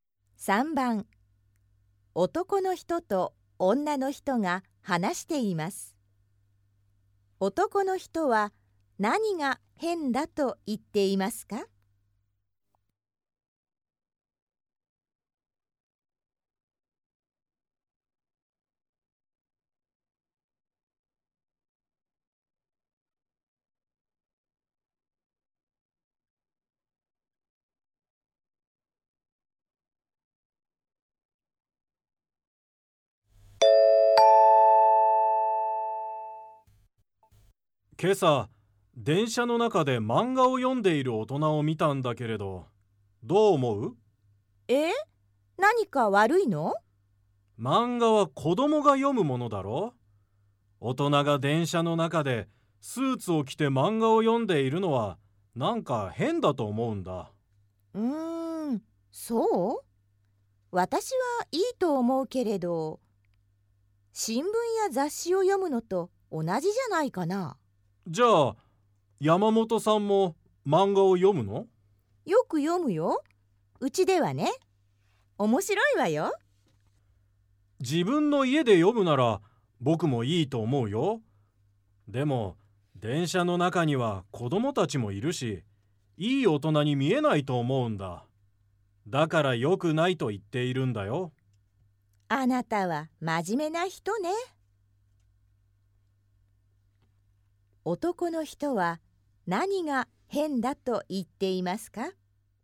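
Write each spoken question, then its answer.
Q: 男の人は何が変だと言っていますか?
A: 大人が電車の中で(スーツを着て)漫画を読んでいること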